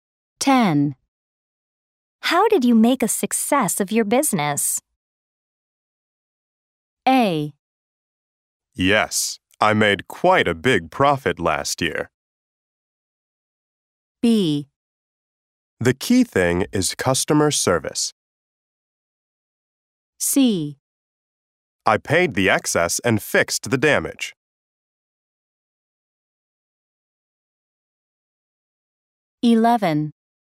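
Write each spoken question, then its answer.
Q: How did you make a success of your business?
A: B: The key thing is customer service.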